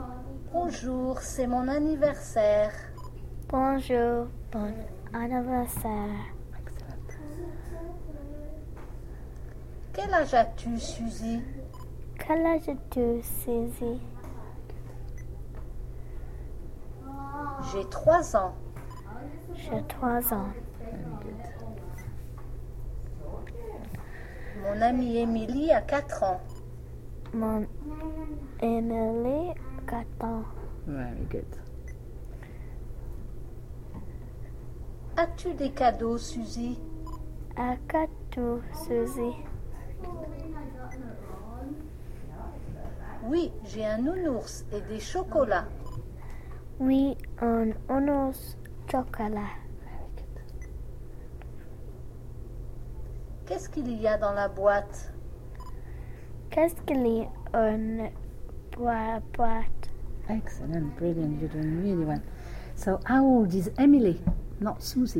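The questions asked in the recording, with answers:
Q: So, how old is Emily? Not Susie, Emily.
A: 4 years old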